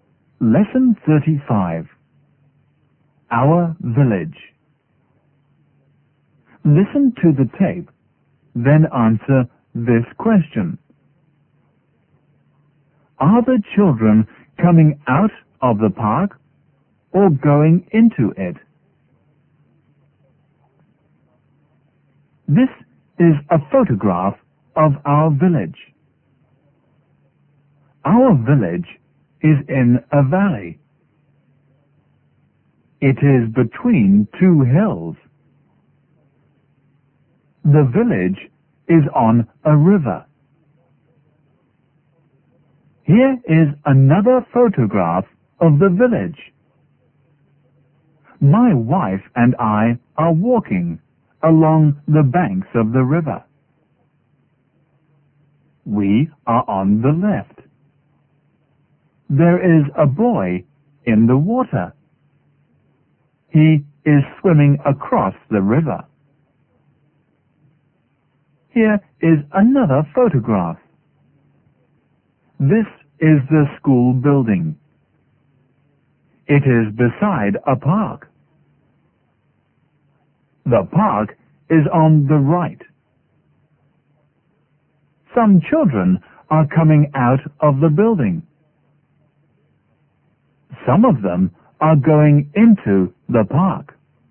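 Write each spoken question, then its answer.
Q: Are the children coming out of the park or going into it?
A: They are going into it.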